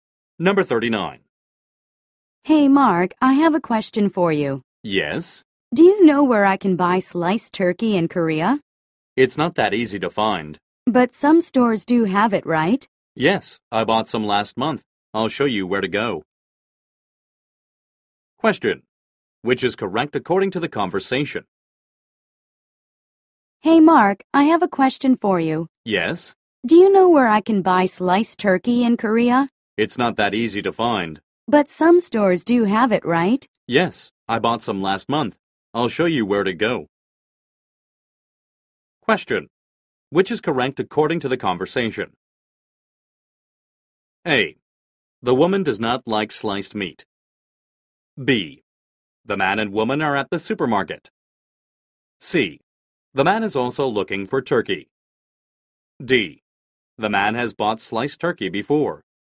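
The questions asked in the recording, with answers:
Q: Which is correct according to the conversation?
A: D: The man has bought sliced turkey before.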